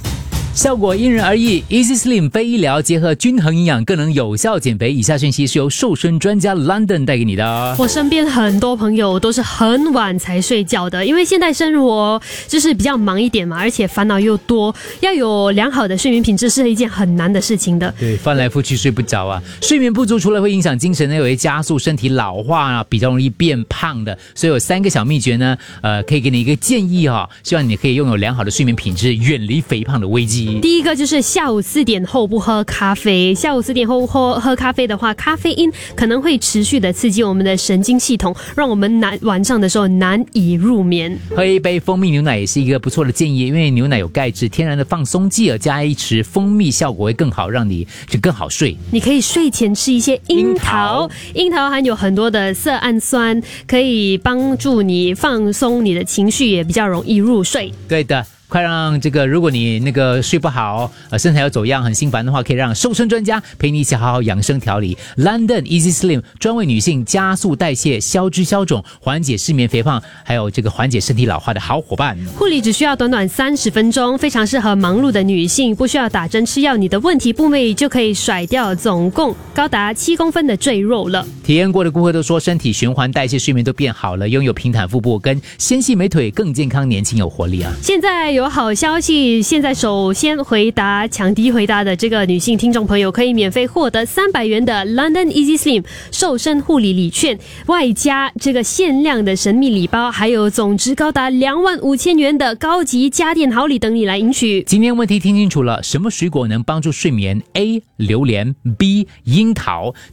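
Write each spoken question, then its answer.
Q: 什么水果能帮助睡眠? A 榴莲, B 樱桃。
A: B: 樱桃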